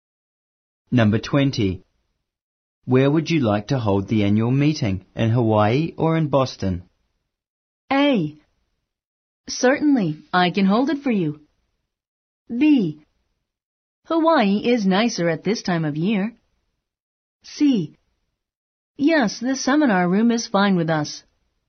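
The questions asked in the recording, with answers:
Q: Where would you like to hold the annual meeting, in Hawaii or in Boston?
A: B: Hawaii is nicer at this time of year.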